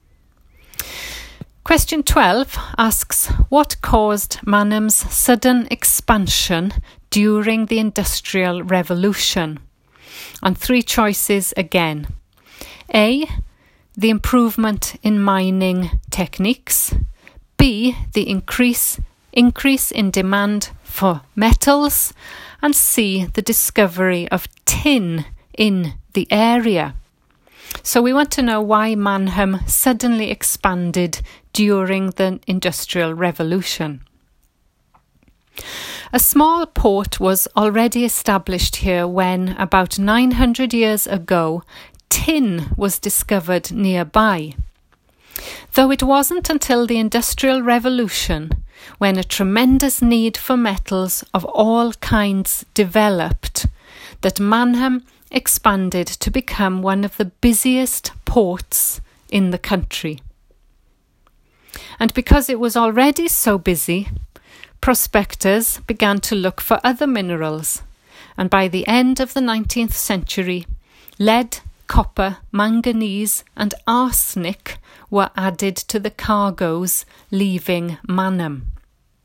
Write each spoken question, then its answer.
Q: what caused Manham's sudden expansion during the Industrial Revolution?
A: So the answer is B, the increase in demand for metals.